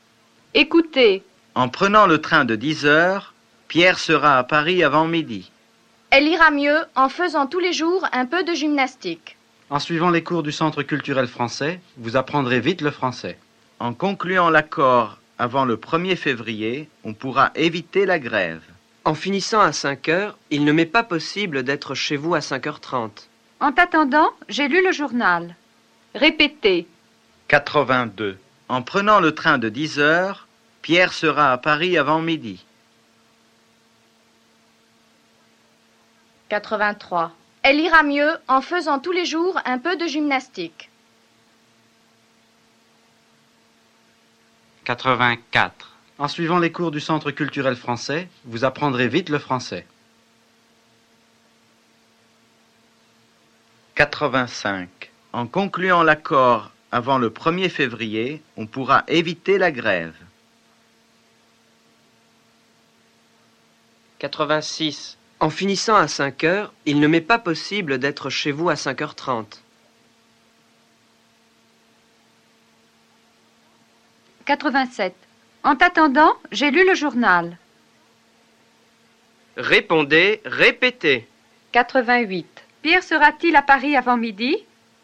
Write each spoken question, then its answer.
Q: Pierre sera-t-il à Paris avant midi?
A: Oui, en prenant le train de 10 heures, Pierre sera à Paris avant midi.